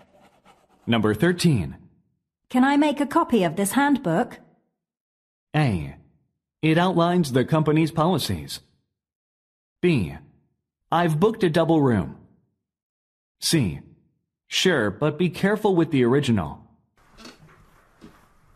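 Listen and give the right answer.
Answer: C: Sure, but be careful with the original.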